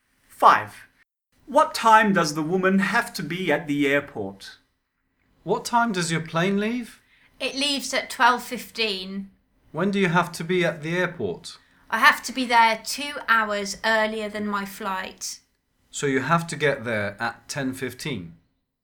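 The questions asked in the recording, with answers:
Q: What time does the woman have to be at the airport?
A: 10:15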